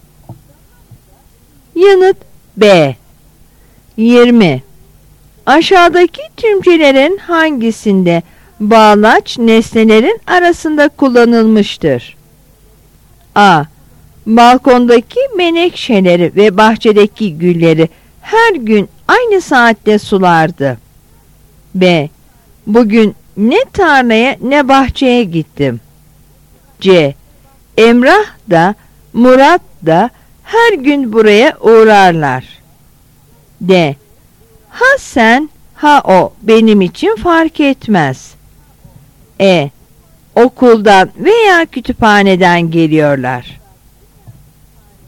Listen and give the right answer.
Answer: Yanıt A.